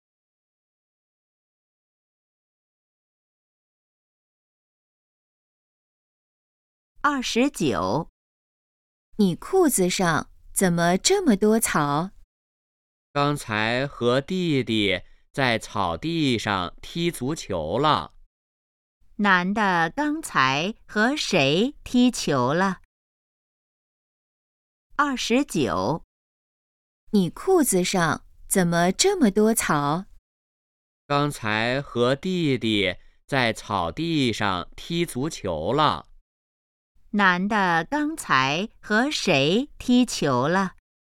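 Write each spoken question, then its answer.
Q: 男的刚才和谁踢球了?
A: 弟弟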